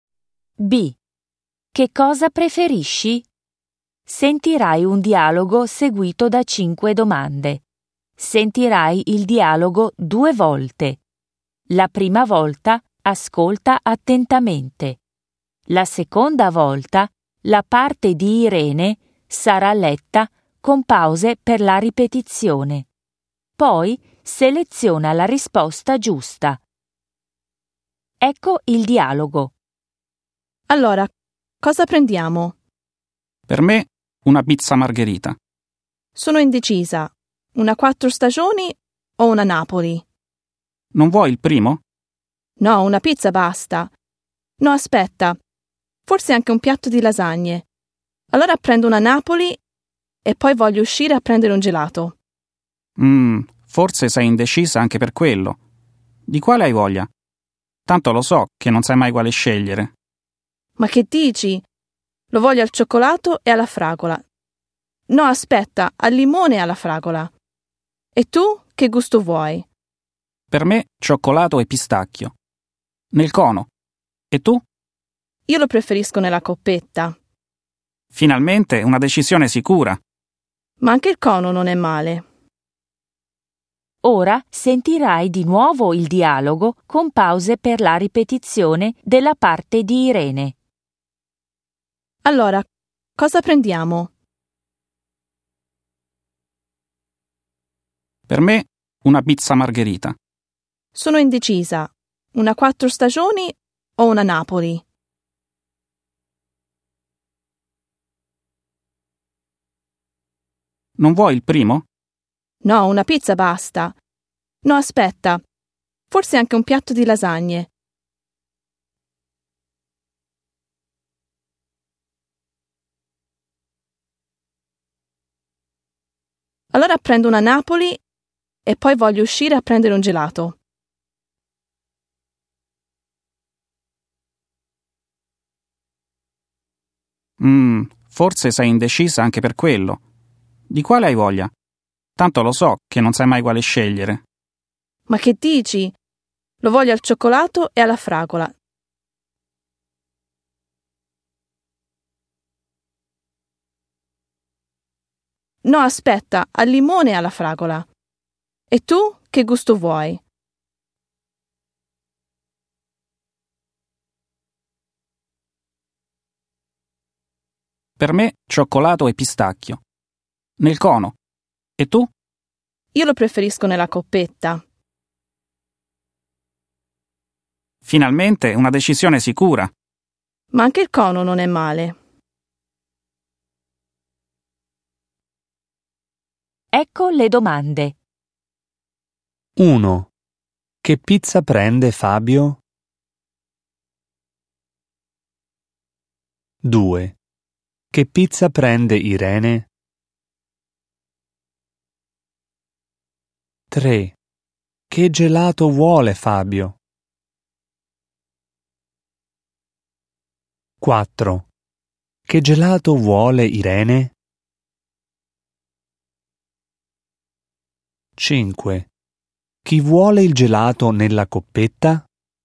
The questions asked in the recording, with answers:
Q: Che pizza prende Fabio?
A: 1. A.

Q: Che gelato vuole Fabio?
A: 3. A.

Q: Che gelato vuole Irene?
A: 4. B.

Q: Chi vuole il gelato nella coppetta?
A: 5. B.